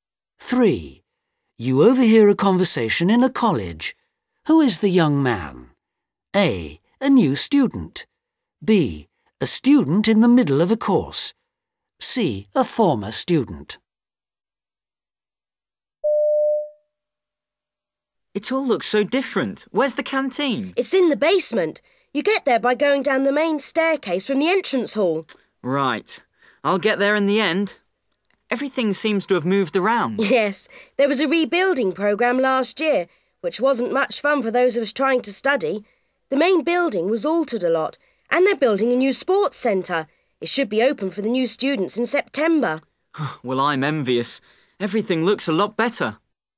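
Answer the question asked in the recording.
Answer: C: A former student.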